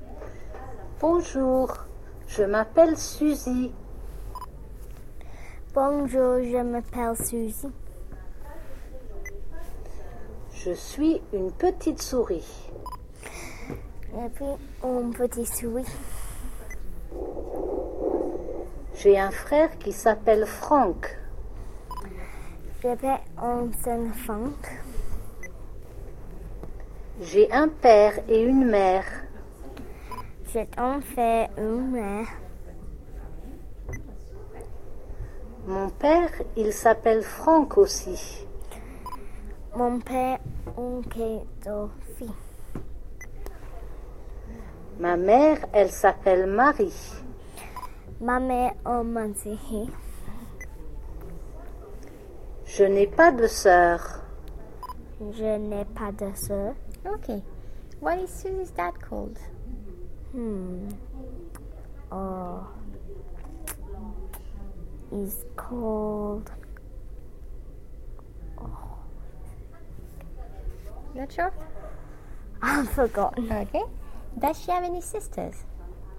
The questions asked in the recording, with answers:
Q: Does she have any sisters?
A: No.